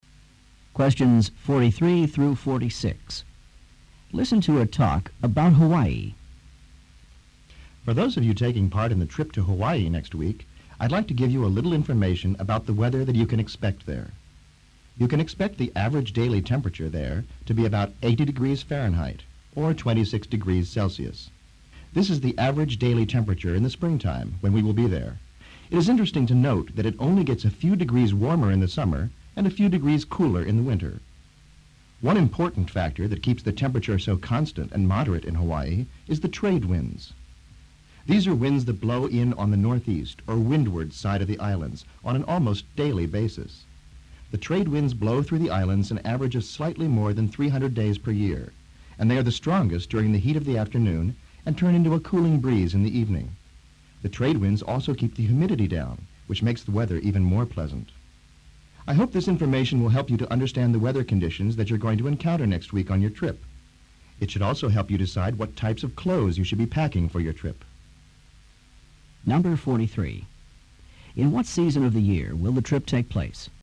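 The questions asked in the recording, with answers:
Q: In what season of the year will the trip take place?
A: Spring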